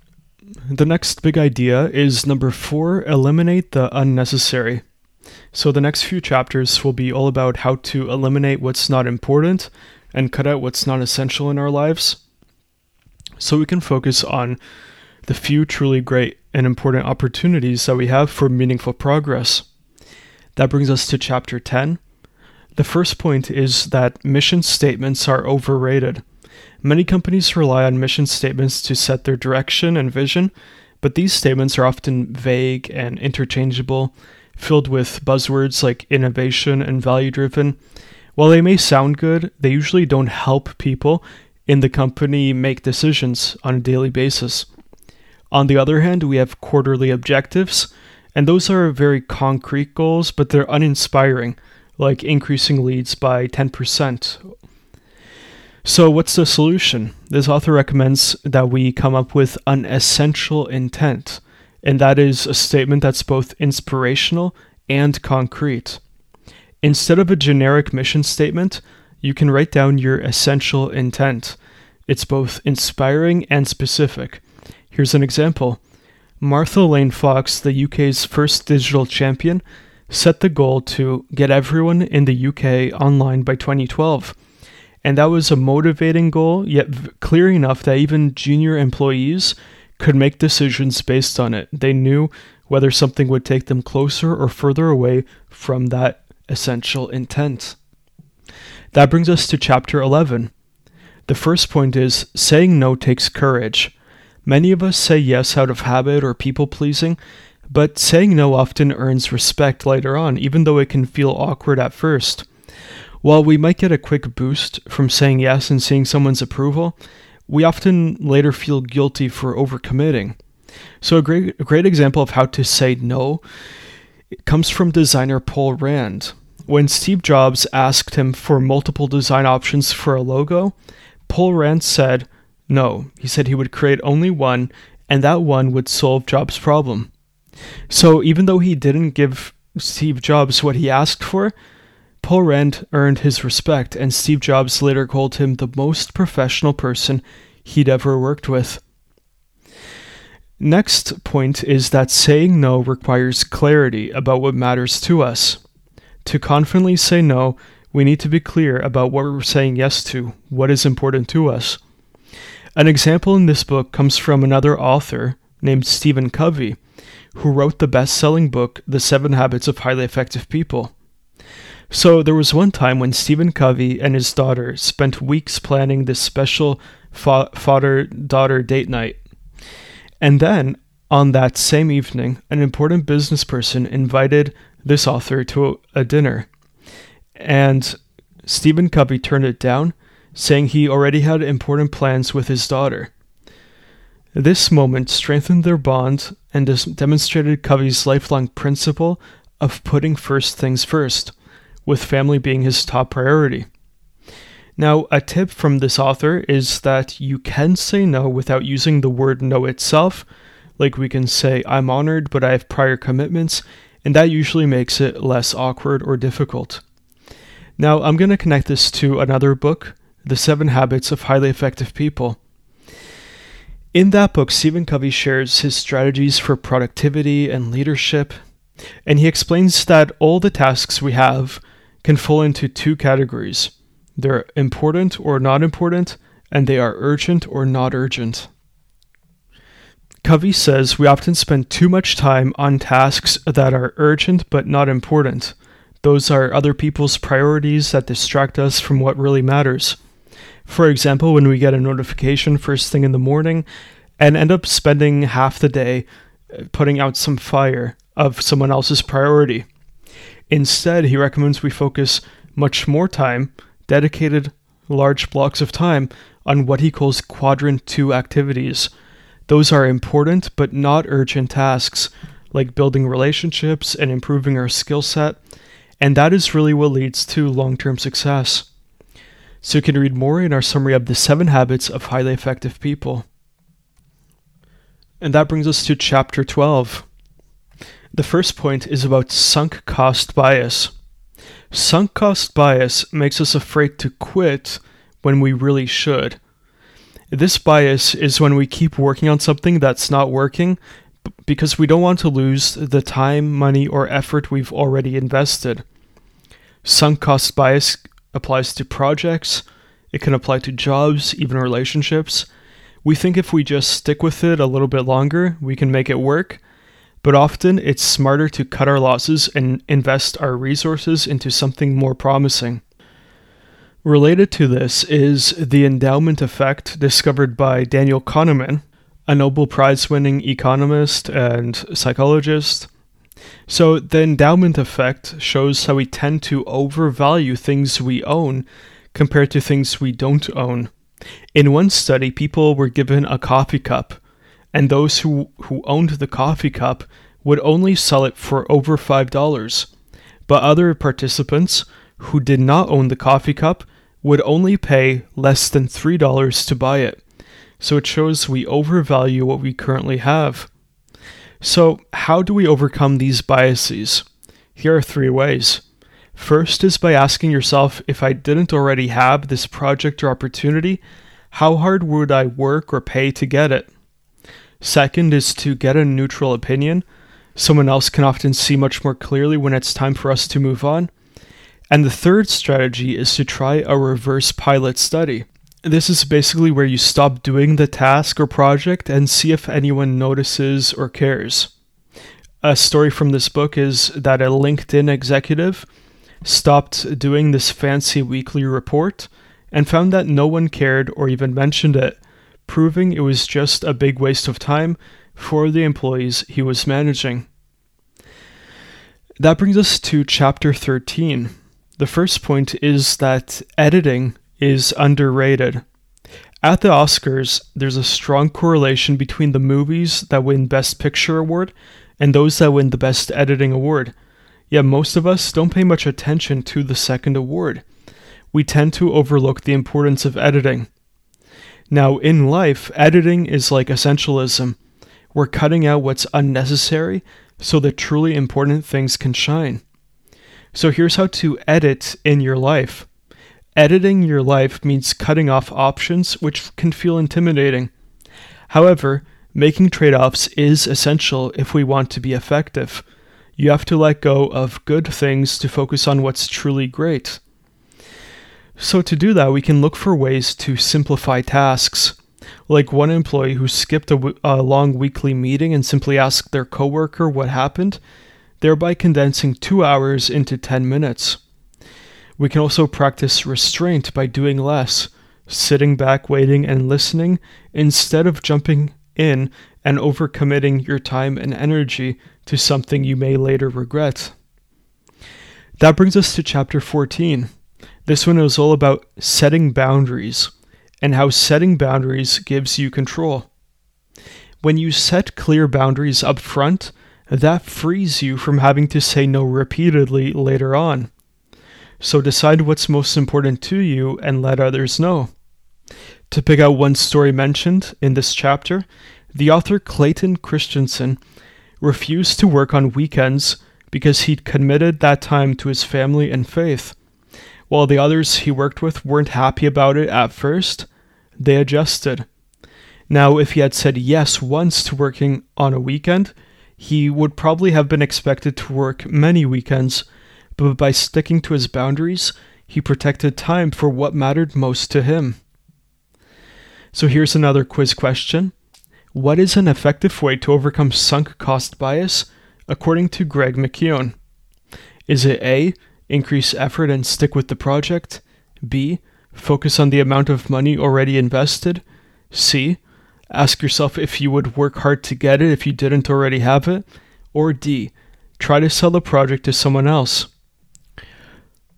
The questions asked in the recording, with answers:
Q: What is an effective way to overcome sunk cost bias, according to Greg McKeown?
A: So the correct answer here is C.